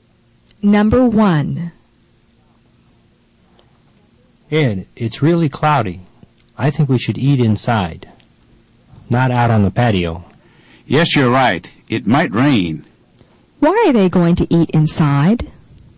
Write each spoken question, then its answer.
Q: Why are they going to eat inside?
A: The answer is, it might rain.